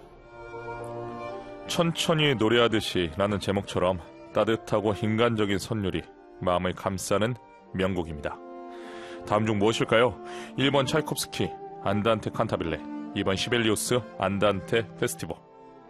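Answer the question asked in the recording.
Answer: 1: 차이콥스키 안단테 칸타빌레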